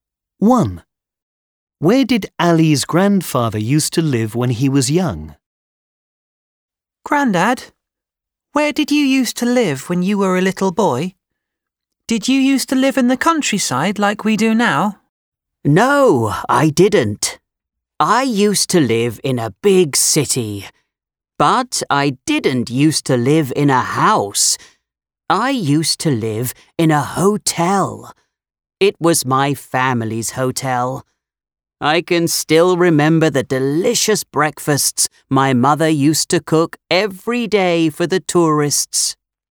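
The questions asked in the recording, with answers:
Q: Where did Ali's grandfather used to live when he was young?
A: In a hotel (his family's hotel) in a big city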